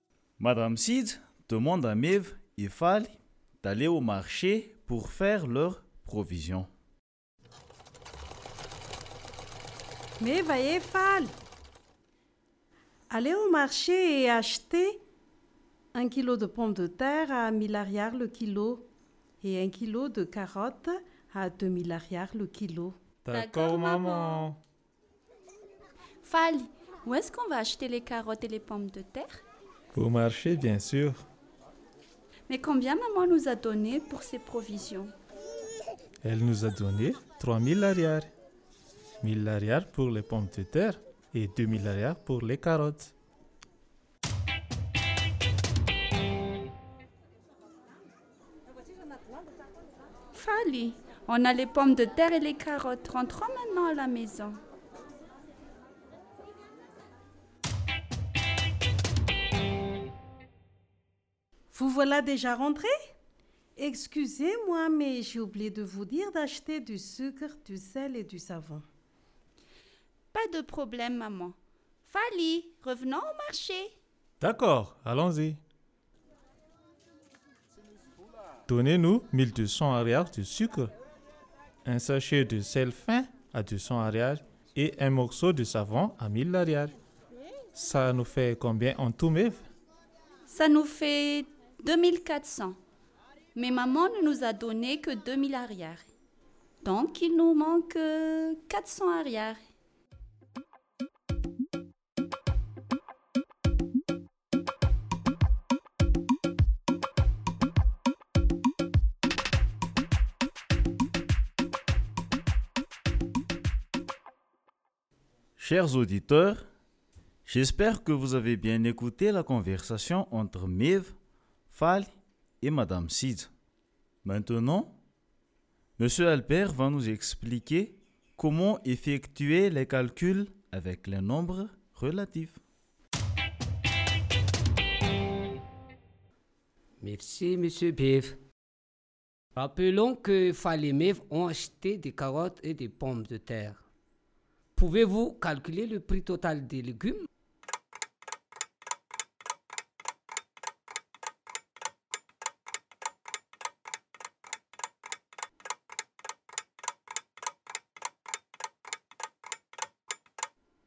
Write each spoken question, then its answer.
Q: Pouvez-vous calculer le prix total des légumes?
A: Deux mille ariary plus mille ariary égale à 3000 ariary.